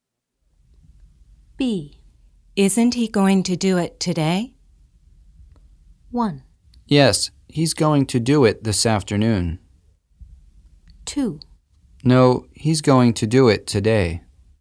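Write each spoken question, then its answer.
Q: Isn't he going to do it today?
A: 1: Yes, he's going to do it this afternoon.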